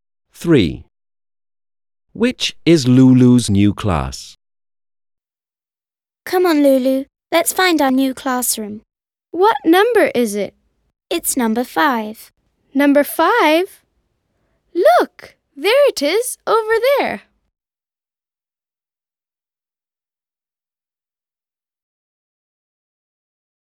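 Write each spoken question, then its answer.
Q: Which is Lulu's new class?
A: Number 5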